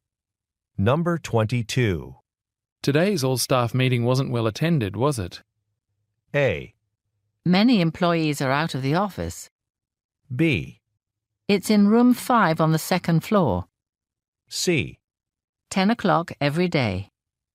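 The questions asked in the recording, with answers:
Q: Today's all-staff meeting wasn't well attended, was it?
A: A: Many employees are out of the office.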